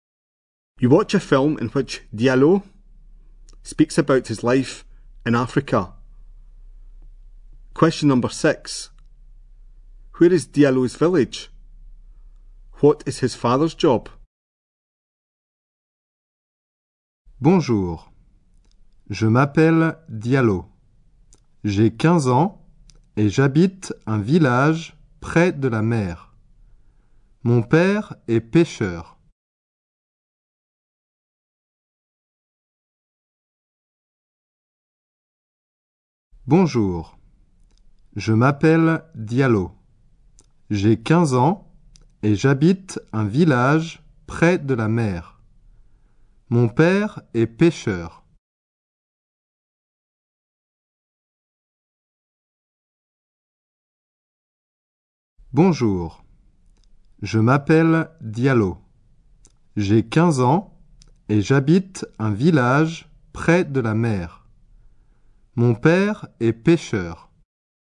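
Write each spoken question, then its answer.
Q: Where is Diallo's village?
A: Near the sea

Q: What is his father's job?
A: Fisherman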